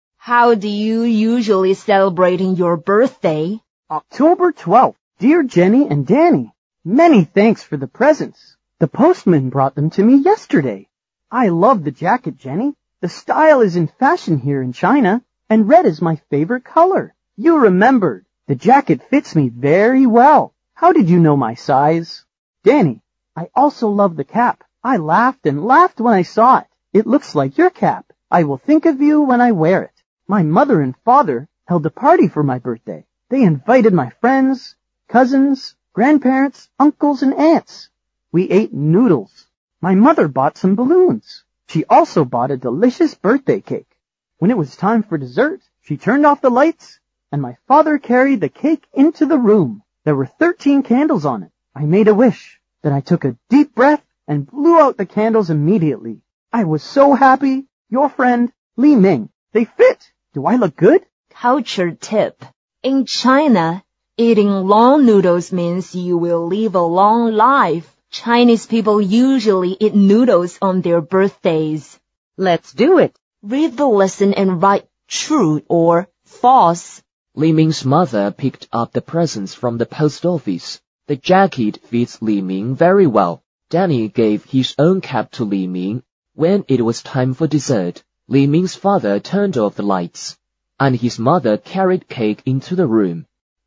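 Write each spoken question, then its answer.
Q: Li Ming's mother picked up the presents from the post office.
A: False

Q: The jacket fits Li Ming very well.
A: True

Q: When it was time for dessert, Li Ming's father turned off the lights, and his mother carried cake into the room.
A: False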